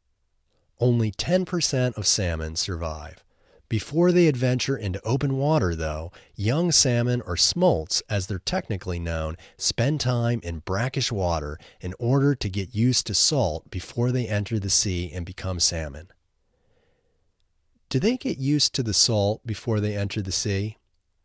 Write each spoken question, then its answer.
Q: Do they get used to the salt before they enter the sea?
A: Yes, they get used to the salt before they enter the sea.